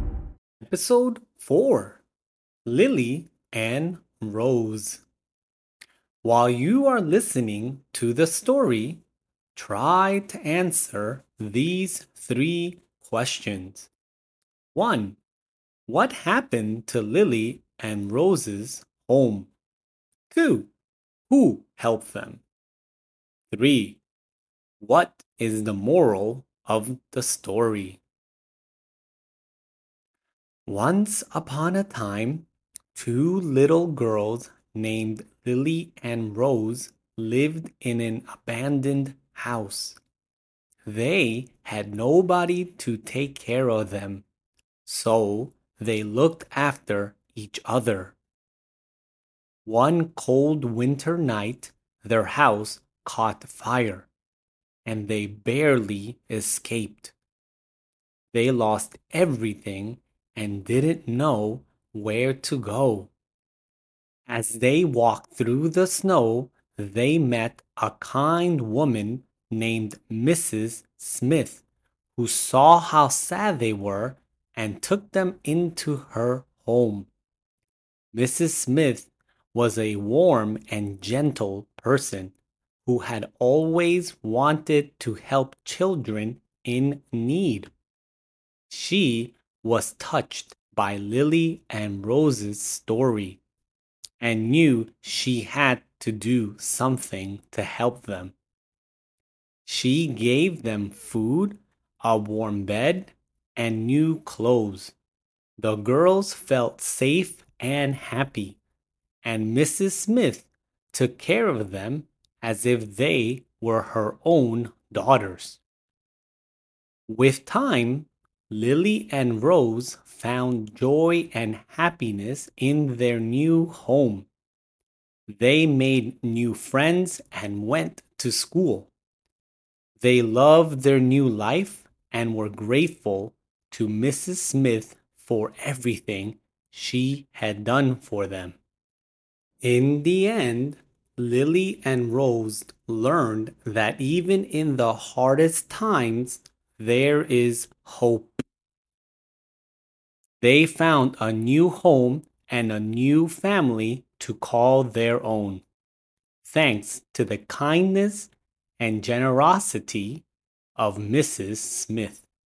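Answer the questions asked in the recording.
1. It caught fire
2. Mrs. Smith, a kind woman
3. Even in the hardest times, there is hope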